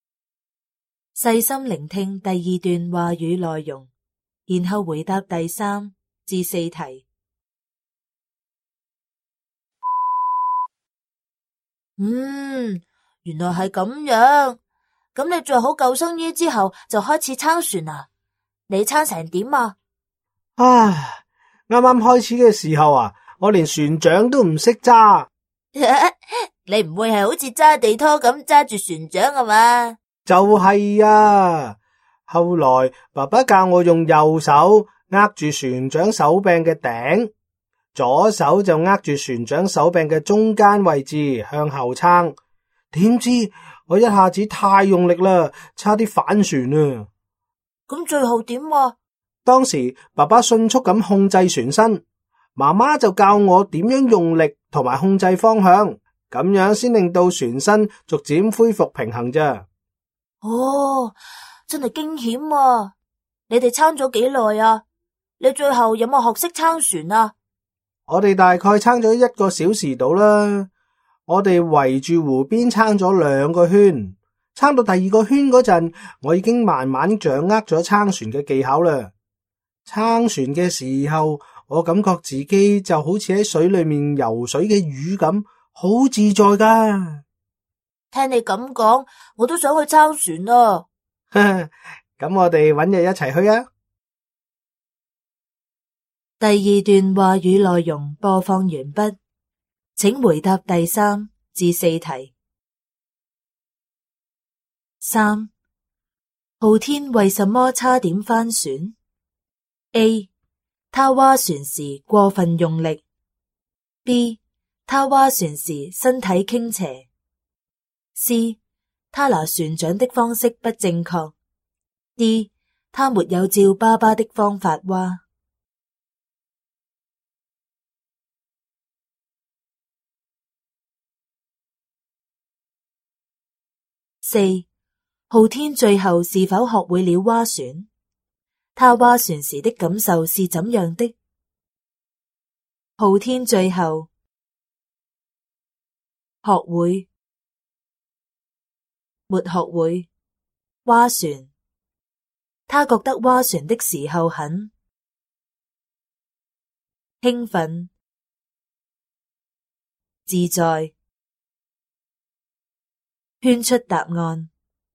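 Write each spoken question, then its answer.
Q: 浩天为什么差点翻船 ?A, 他划船时过分用力。B, 他划船时身体倾斜。 C, 他拿船桨的方式不正确。D, 他没有照爸爸的方法划。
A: A: 他划船时过分用力。

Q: 浩天最后是否学会了划船?他划船时的感受是怎样的?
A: 学会了划船,感觉很自在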